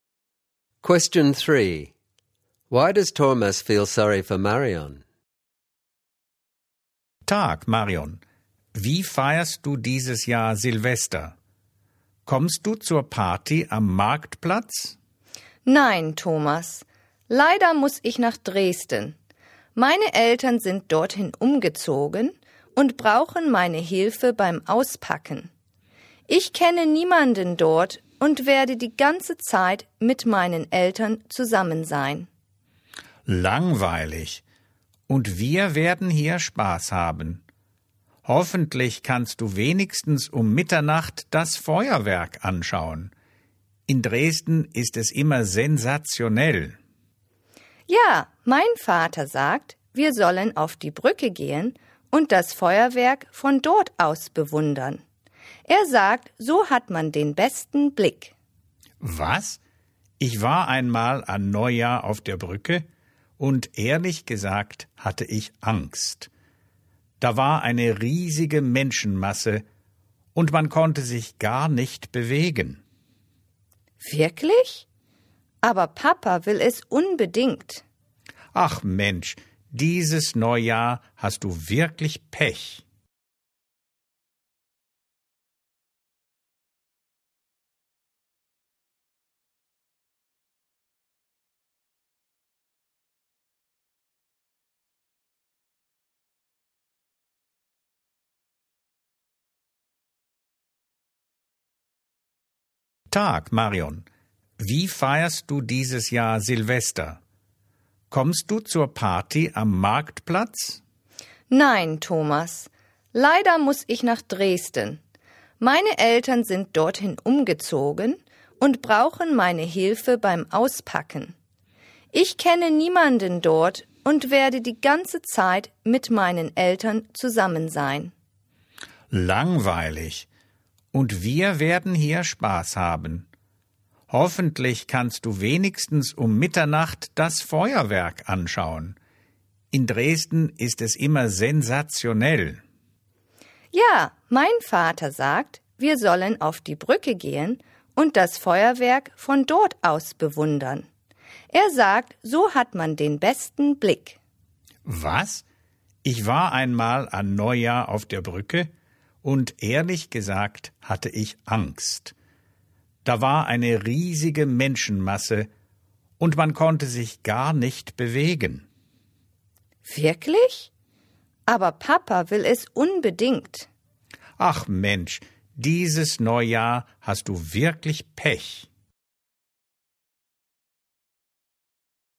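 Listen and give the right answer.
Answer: She must spend New Year in Dresden helping her parents unpack, knows no one there, and her father wants to watch fireworks from the crowded bridge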